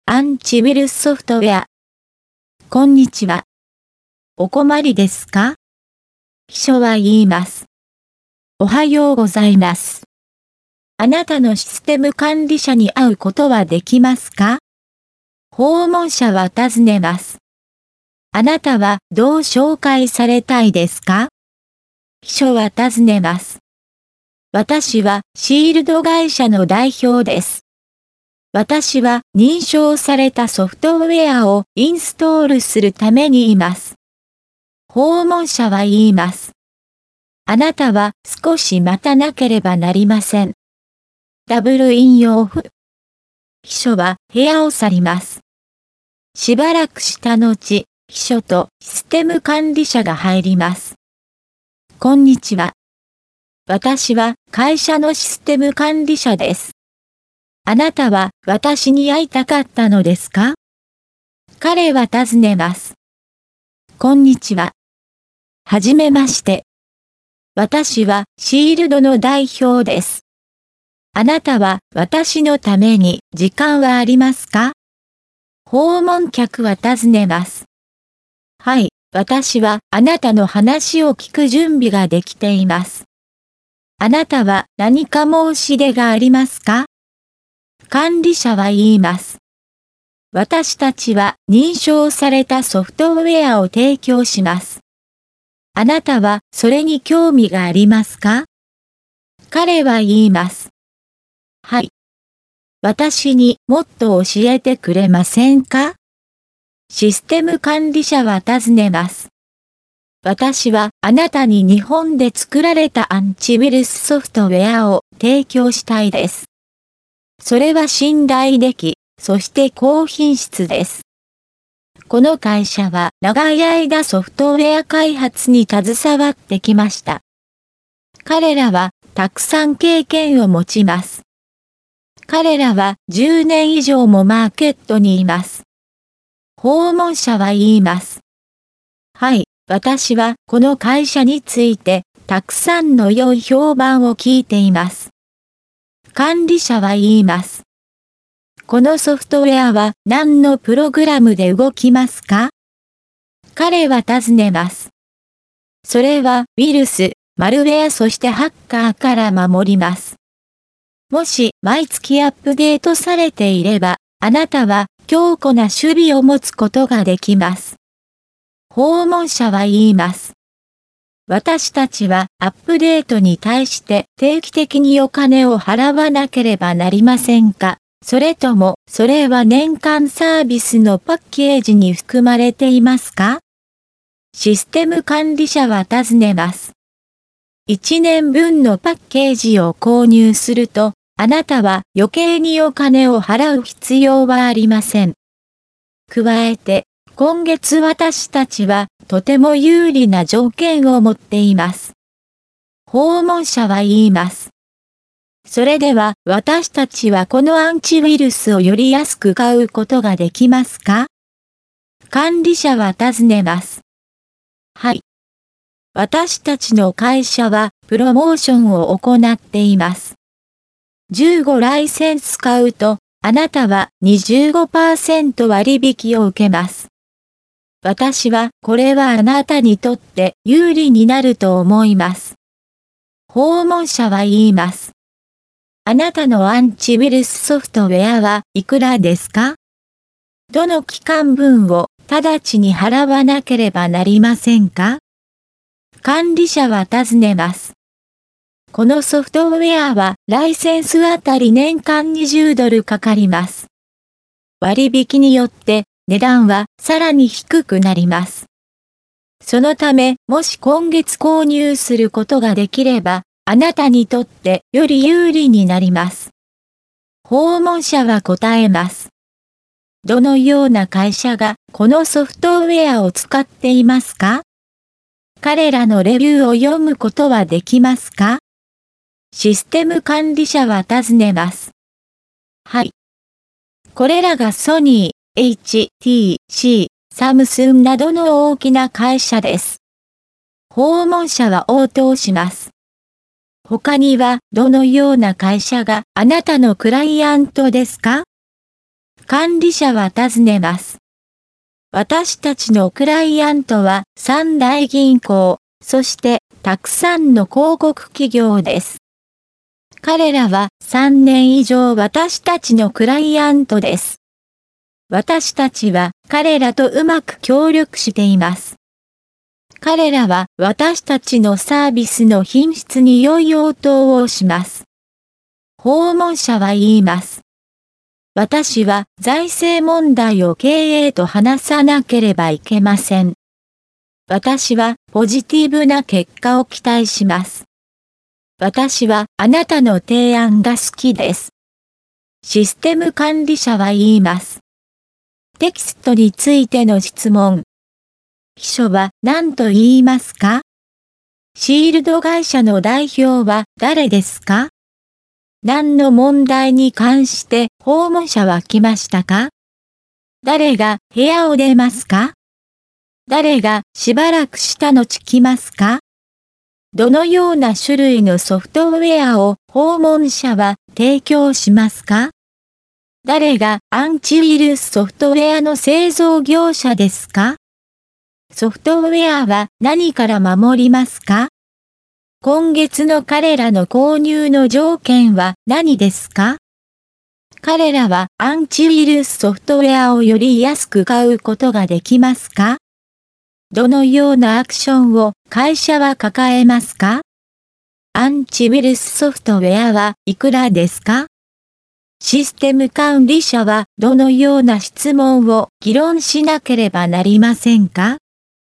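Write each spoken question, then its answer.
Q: シールド会社の代表は誰ですか?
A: 訪問者

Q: 何の問題に関して訪問者は来ましたか?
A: 認証されたソフトウェアをインストールするため

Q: 誰が部屋を出ますか?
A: 秘書

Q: 誰がしばらくした後来ますか?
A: 秘書とシステム管理者

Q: どのような種類のソフトウェアを訪問者は提供しますか?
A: 日本で作られたアンチウイルスソフトウェア

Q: ソフトウェアは何から守りますか?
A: ウイルス、マルウェア、ハッカー

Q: 今月の彼らの購入の条件は何ですか?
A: 15ライセンス買うと25%割引

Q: 彼らはアンチウイルスソフトウェアをより安く買うことができますか?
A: はい

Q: どのようなアクションを会社は抱えますか?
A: プロモーション

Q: アンチウイルスソフトウェアはいくらですか?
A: ライセンスあたり年間20ドル

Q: システム管理者はどのような質問を議論しなければなりませんか?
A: 財政問題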